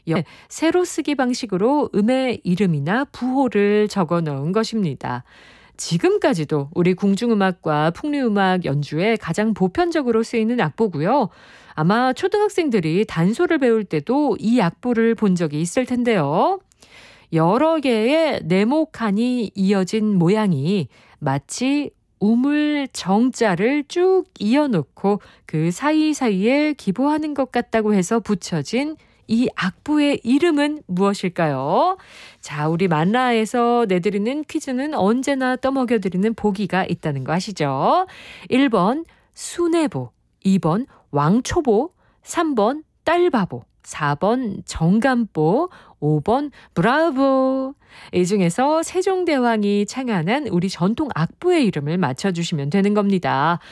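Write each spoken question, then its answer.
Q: 여러 개의 네모 칸이 이어진 모양이 마치 우물 정자를 쭉 이어놓고 그 사이사이에 기보하는 것 같다고 해서 붙여진 이 악보의 이름은 무엇일까요?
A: 4: 정감보 (정간보)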